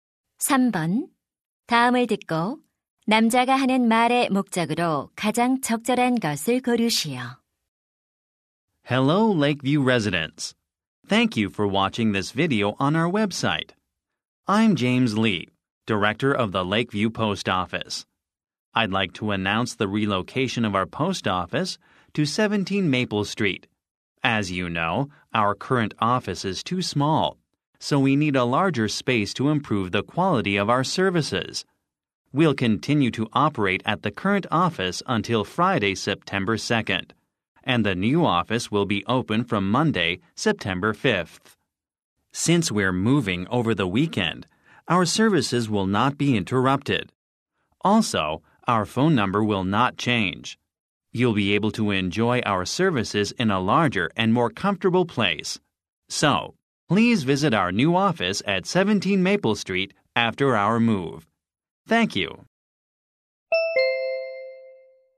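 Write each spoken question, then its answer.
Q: 다음을 듣고 남자가 하는 말의 목적으로 가장 적절한 것을 고르시오.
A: 우체국 이전을 안내하려고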